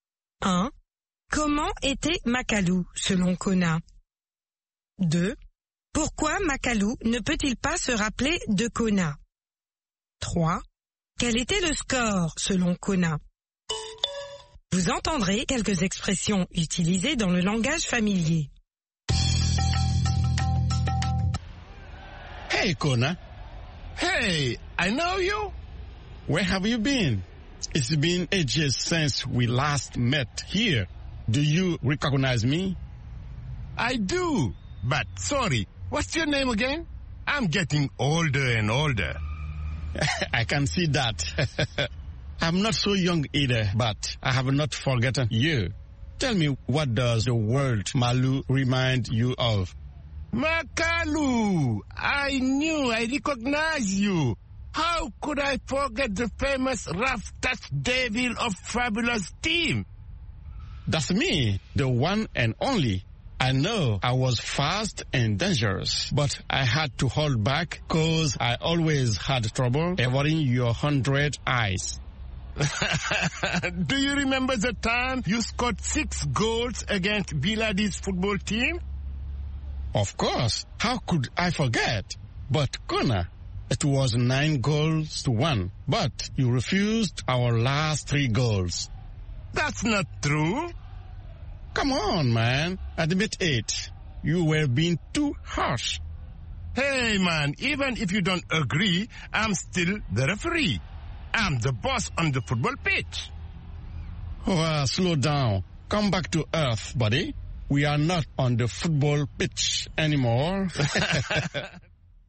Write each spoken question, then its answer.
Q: Pourquoi Makalu ne peut-il pas se rappeler de Kona?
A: Parce qu'il devient de plus en plus vieux.